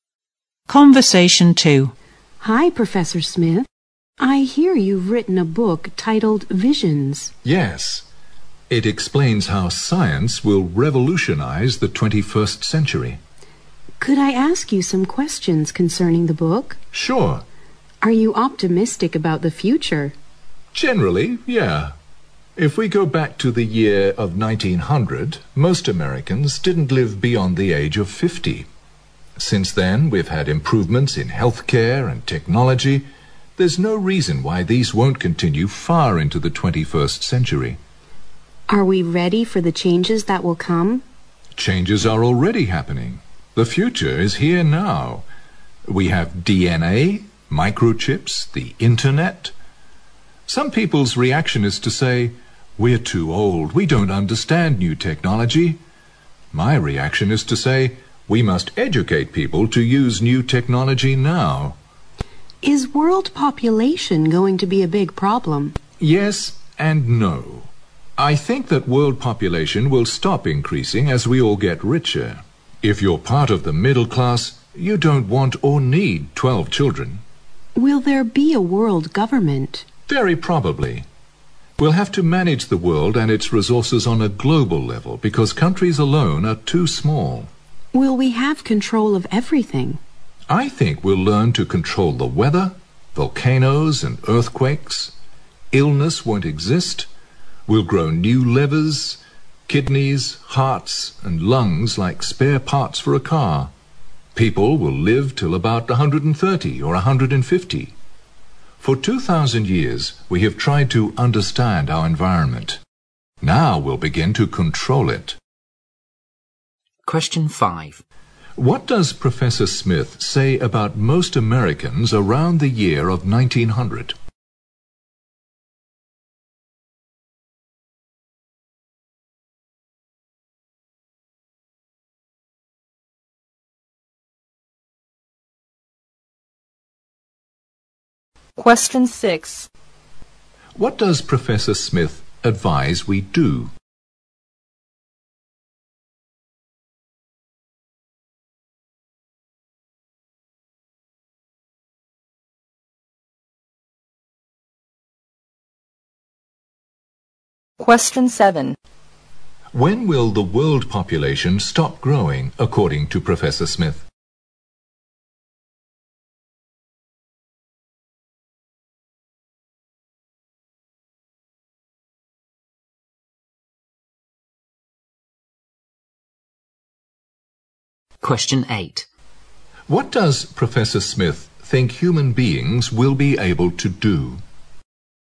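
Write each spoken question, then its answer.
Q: What does Professor Smith say about most Americans around the year of 1900?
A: They didn't live beyond the age of 50.

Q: What does Professor Smith advise we do?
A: Educate people to use new technology now

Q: When will the world population stop growing, according to Professor Smith?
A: When we all get richer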